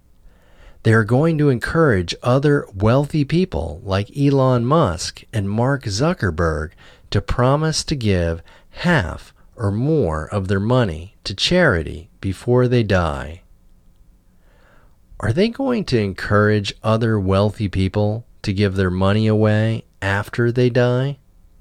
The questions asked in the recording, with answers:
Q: Are they going to encourage other wealthy people to give their money away after they die?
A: No, they aren't going to encourage wealthy people to give their money away after they die.